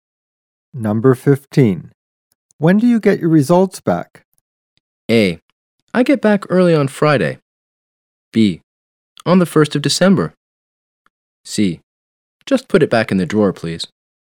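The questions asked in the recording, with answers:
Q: When do you get your results back?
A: B: On the 1st of December.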